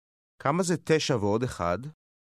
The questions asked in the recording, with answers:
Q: כמה זה 9 ועוד 1?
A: 10.